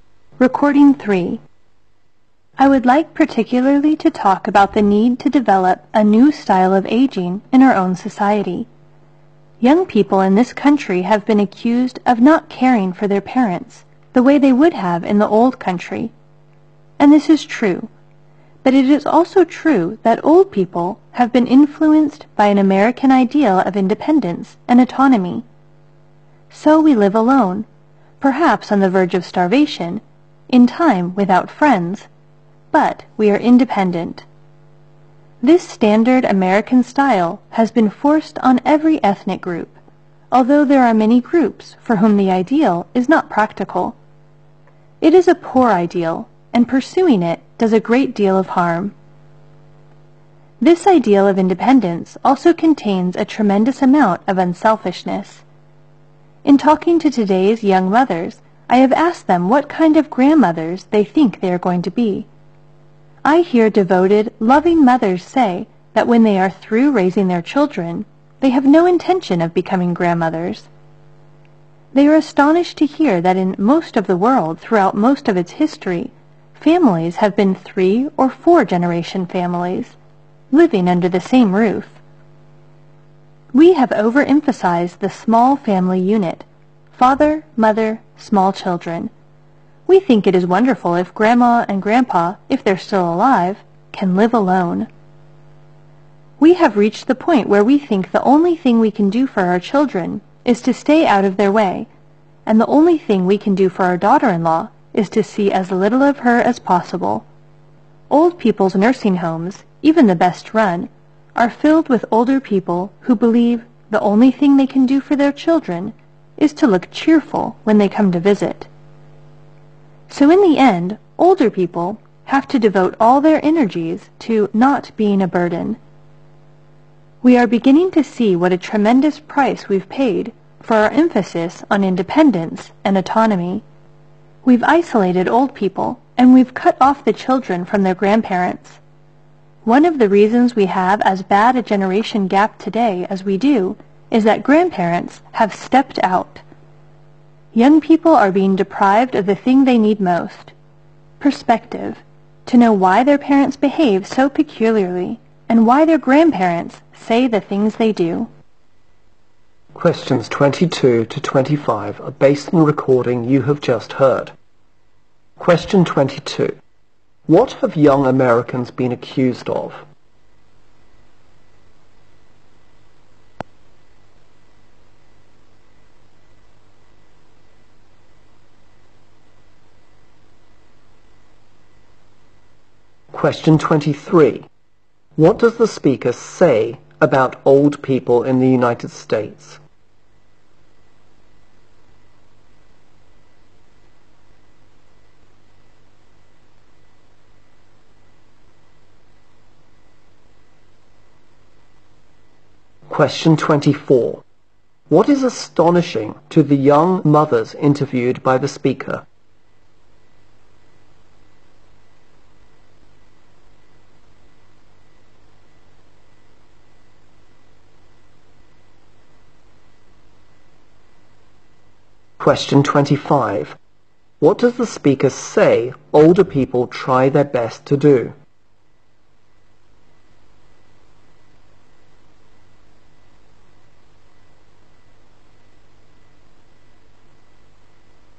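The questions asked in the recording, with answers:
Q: What have young Americans been accused of?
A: Not caring for their parents as they would have in the old country

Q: What does the speaker say about old people in the United States?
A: They have been influenced by the American ideal of independence and autonomy

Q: What is astonishing to the young mothers interviewed by the speaker?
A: That families in most of the world have been three- or four-generation families living under the same roof

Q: What does the speaker say older people try their best to do?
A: Not to be a burden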